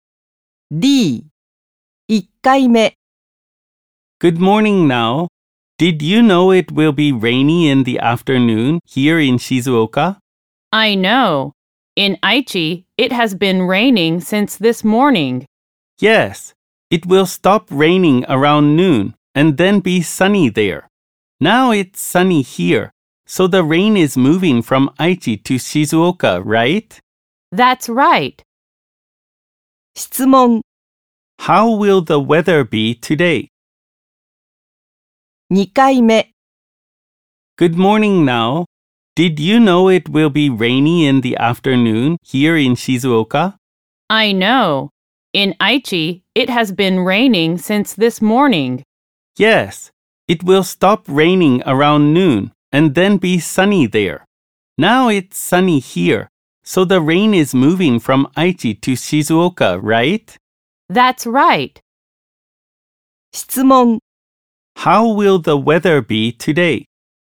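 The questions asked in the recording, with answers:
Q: How will the weather be today?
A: Sunny in the morning, rainy in the afternoon in Shizuoka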